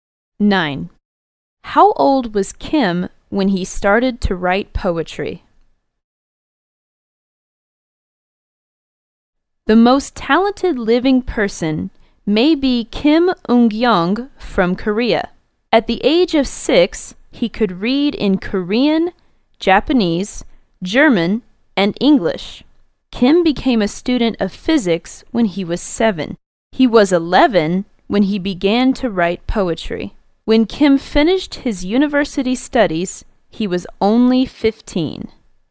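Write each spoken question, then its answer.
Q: How old was Kim when he started to write poetry?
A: 11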